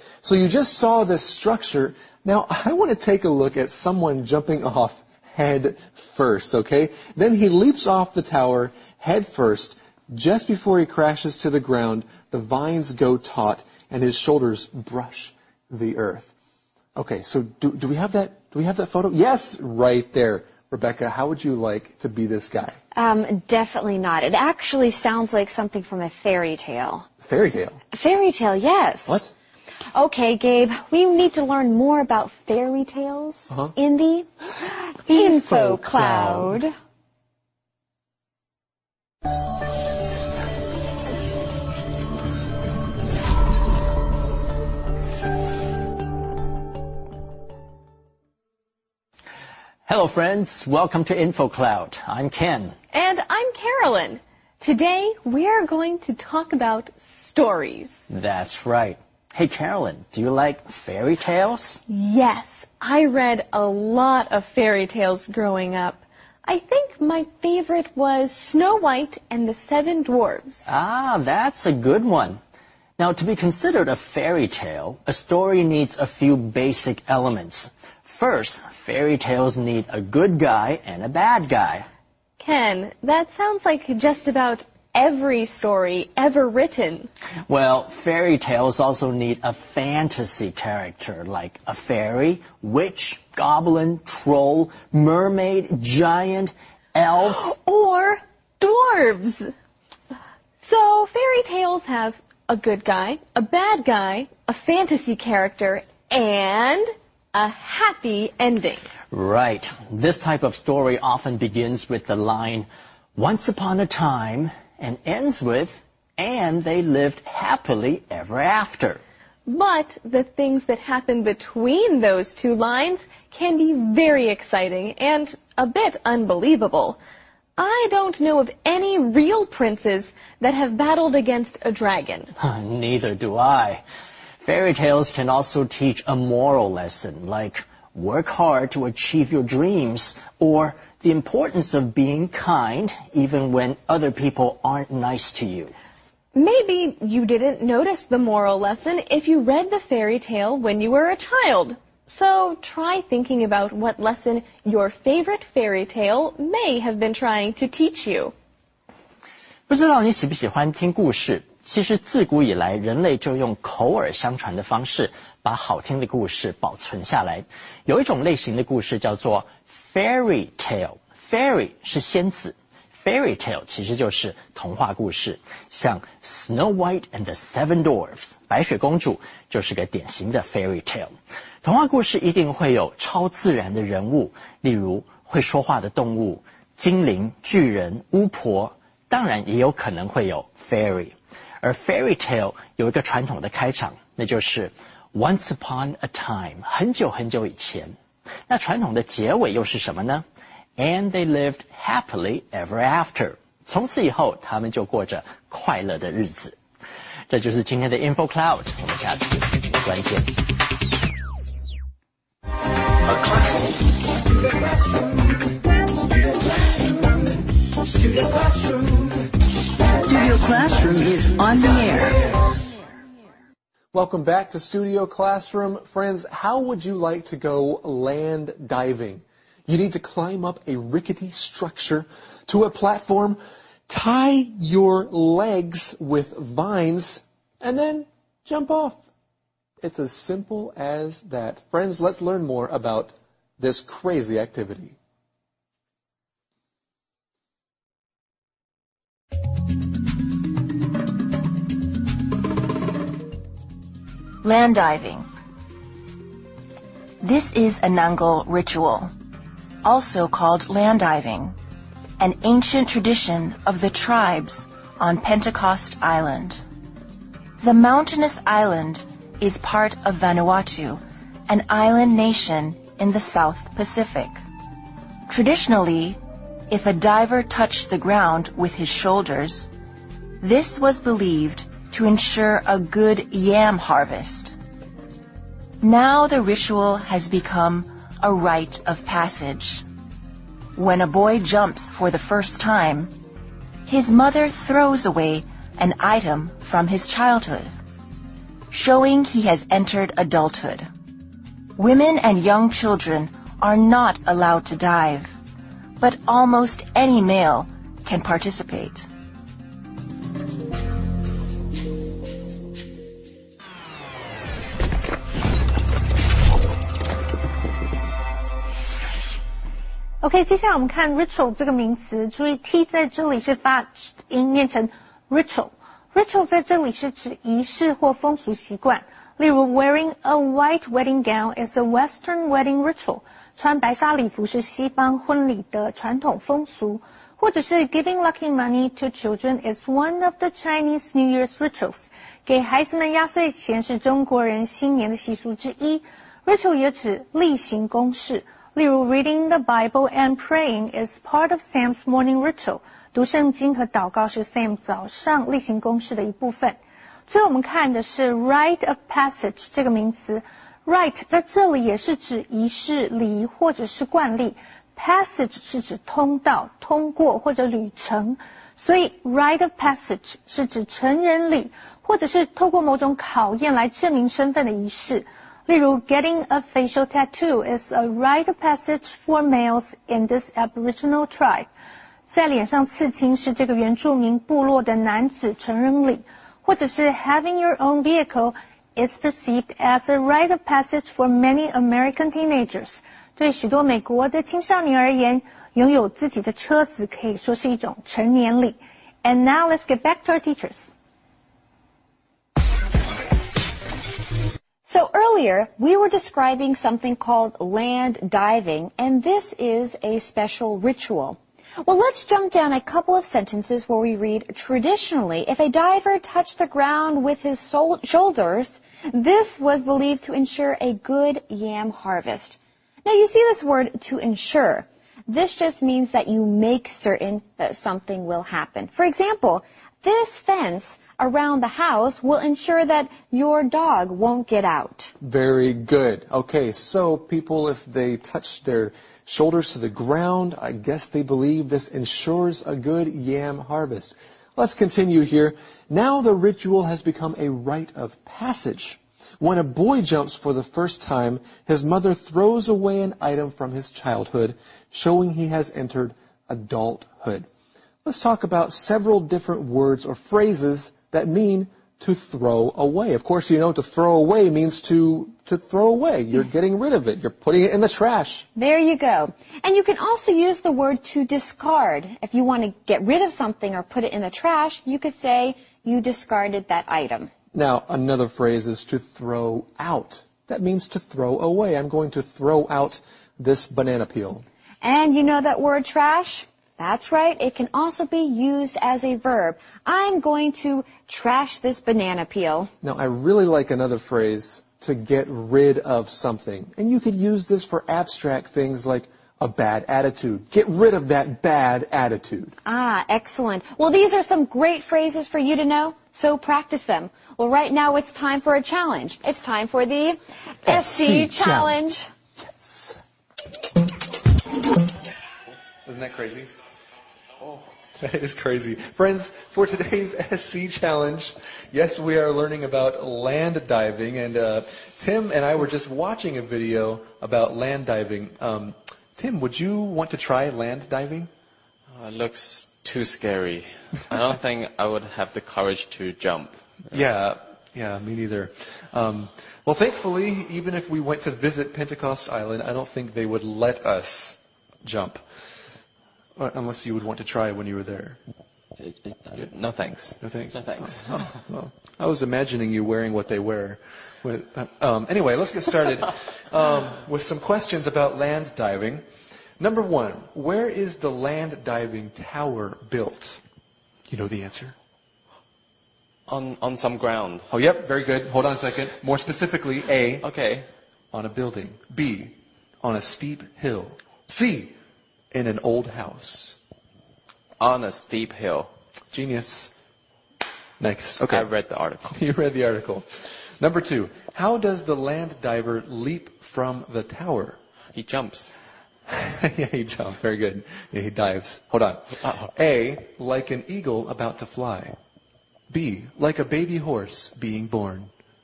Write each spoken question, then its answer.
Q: How does the land diver leap from the tower?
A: So C, head first.